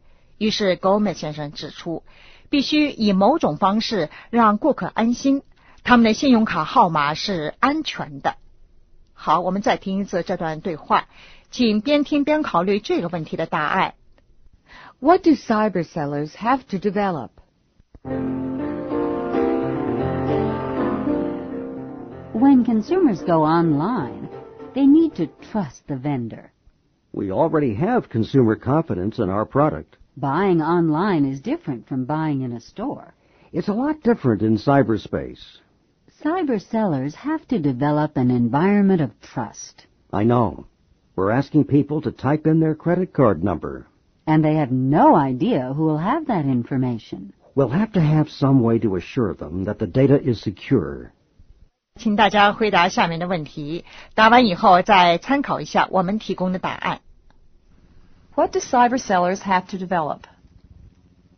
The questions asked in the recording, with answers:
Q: What do cyber sellers have to develop?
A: An environment of trust.